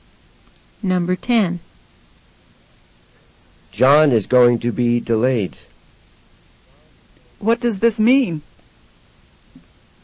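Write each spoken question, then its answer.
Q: What does this mean?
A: John will be late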